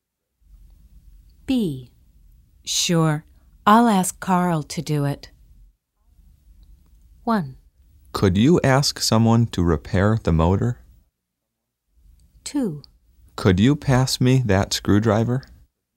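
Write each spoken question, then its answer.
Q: Sure, I'll ask Carl to do it.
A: 1: Could you ask someone to repair the motor?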